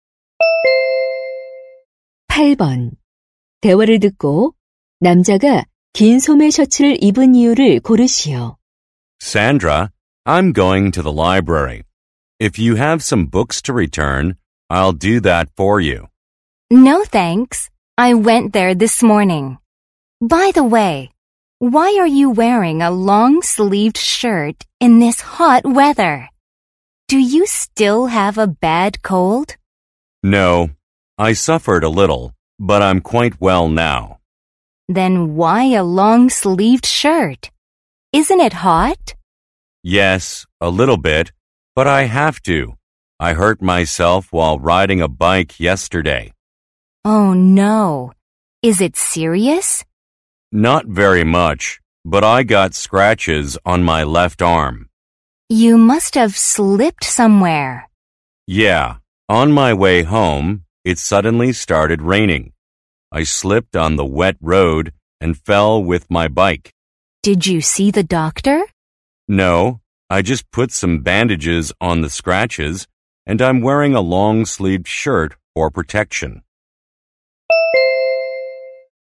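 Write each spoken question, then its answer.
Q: 긴 소매 셔츠를 입은 이유를 고르시오.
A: 자전거를 타다 넘어져 팔에 긁힌 상처를 보호하려고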